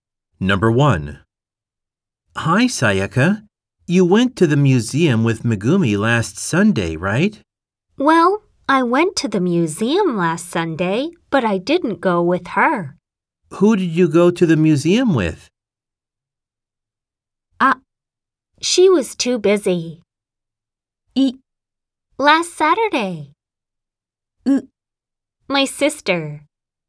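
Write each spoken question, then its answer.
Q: Who did you go to the museum with?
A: ウ: My sister.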